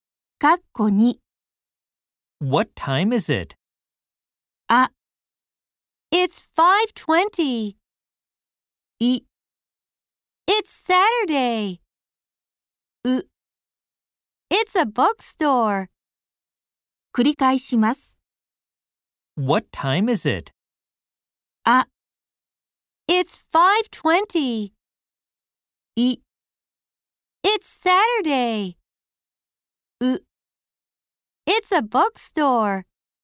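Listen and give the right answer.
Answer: あ: It's 5:20.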